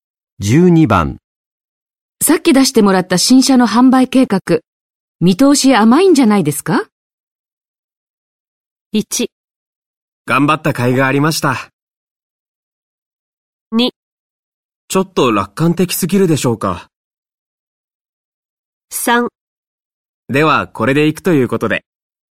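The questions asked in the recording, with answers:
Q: さっき出してもらった新車の販売計画、見通し甘いんじゃないですか?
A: 2: ちょっと楽観的すぎるでしょうか?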